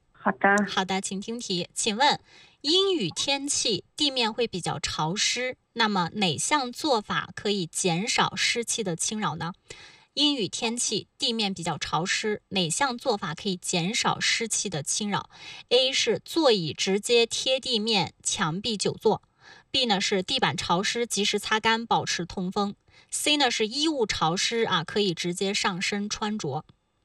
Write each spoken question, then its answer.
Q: 阴雨天气地面比较潮湿,哪项做法可以减少湿气的侵扰?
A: 那正确答案就是 B 啊